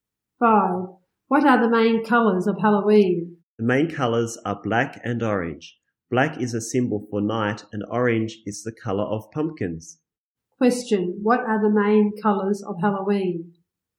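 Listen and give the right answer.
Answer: Black and orange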